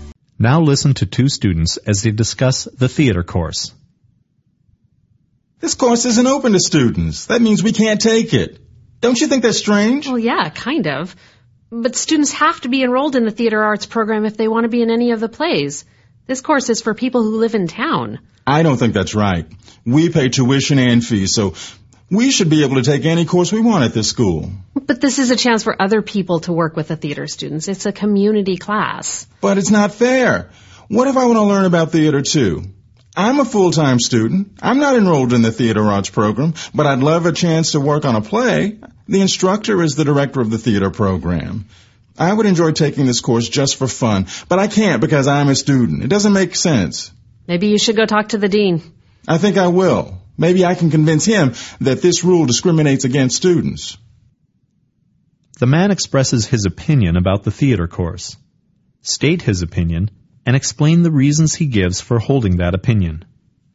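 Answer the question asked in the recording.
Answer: He thinks it is unfair that students can't take the course: they pay tuition and fees so should be able to take any course, and he is a full-time student who would love to work on a play just for fun.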